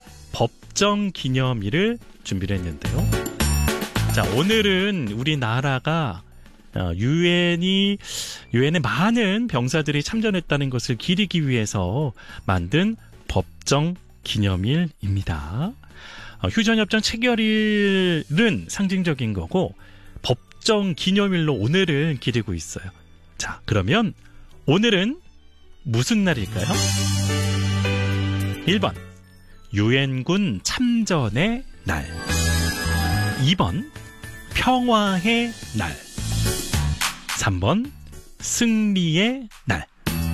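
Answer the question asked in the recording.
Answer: 1: 유엔군 참전의 날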